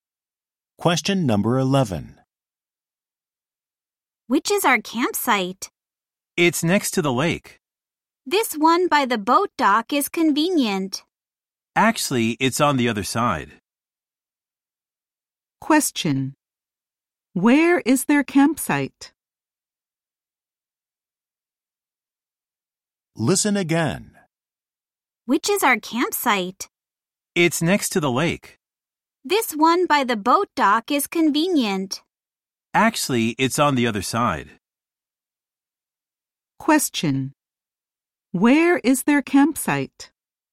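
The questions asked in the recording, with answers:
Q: Question. Where is their campsite?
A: Next to the lake, on the side away from the boat dock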